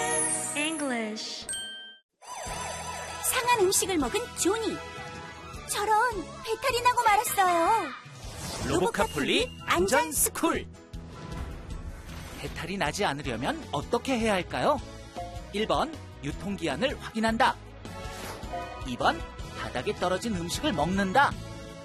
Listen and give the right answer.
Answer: 정답은 1번.